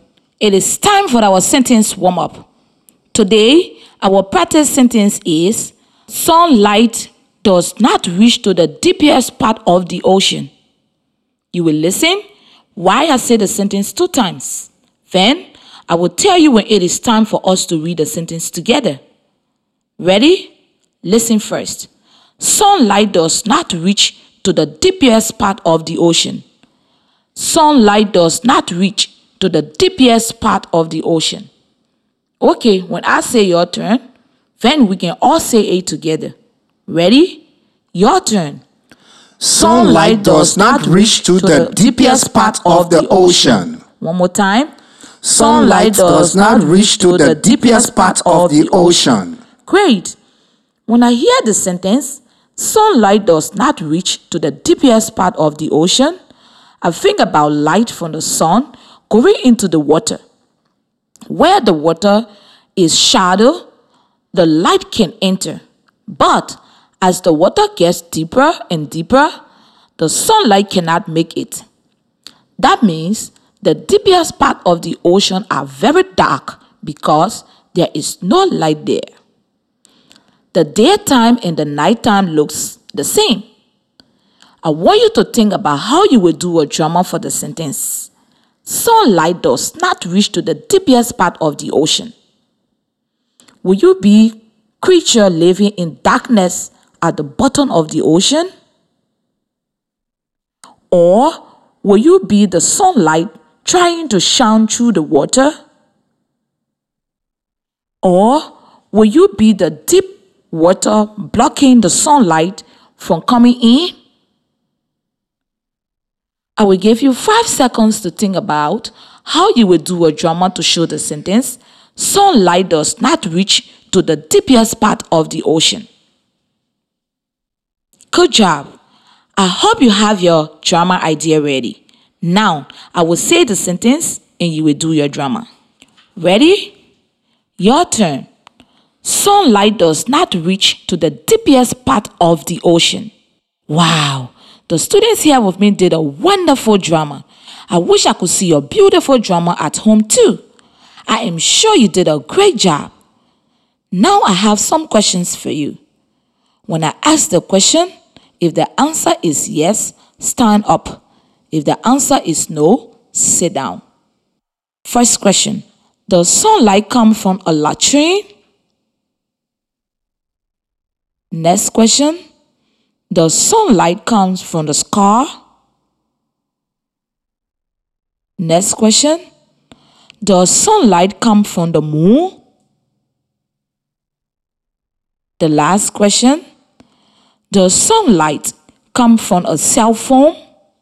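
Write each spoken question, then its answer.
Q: Does sunlight come from a latrine?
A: No

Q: Does sunlight come from the moon?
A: No

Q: does sunlight come from a cell phone?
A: No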